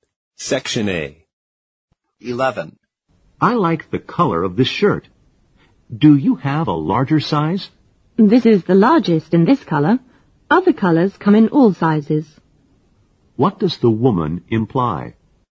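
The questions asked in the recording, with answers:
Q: What does the woman imply?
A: The shirt isn't available in a larger size in this color.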